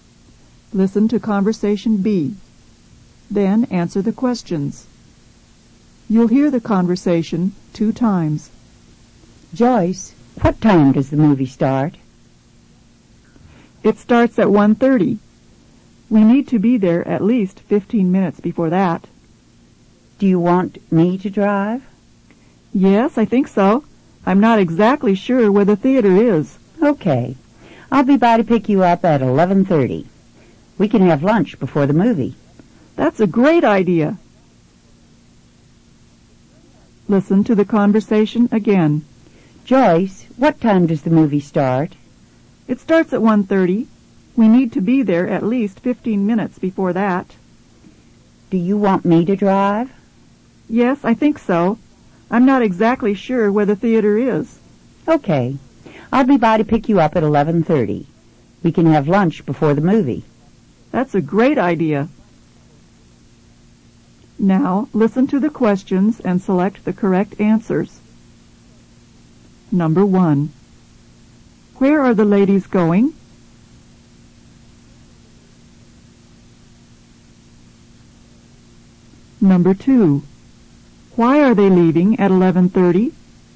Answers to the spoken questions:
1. Number 1 is C. They're going to a movie.
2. Number 2 is C. They're leaving at 11:30 in order to have lunch before the movie.